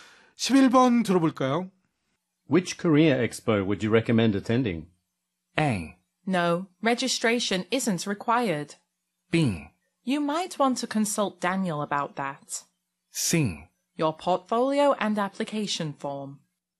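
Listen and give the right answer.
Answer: B: You might want to consult Daniel about that.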